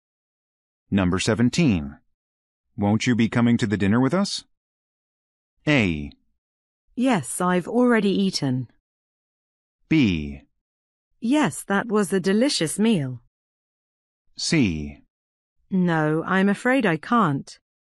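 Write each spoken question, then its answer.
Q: Won't you be coming to the dinner with us?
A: C: No, I'm afraid I can't.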